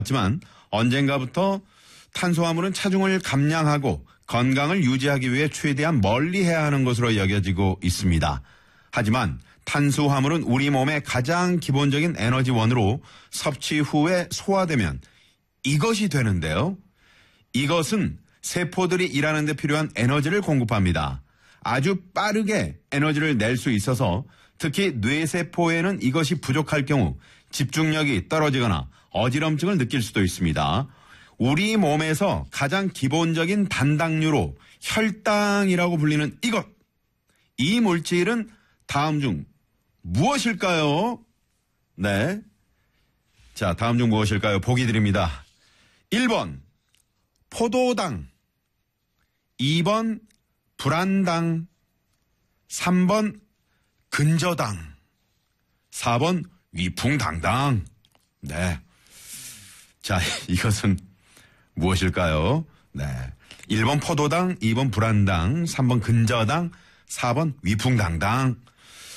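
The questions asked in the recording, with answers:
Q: 이 물질은 다음 중 무엇일까요?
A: 1번: 포도당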